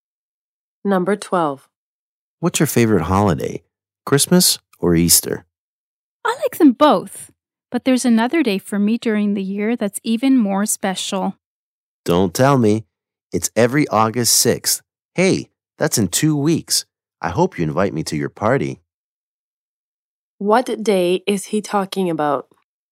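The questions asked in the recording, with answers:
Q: What day is he talking about?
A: His birthday, August 6th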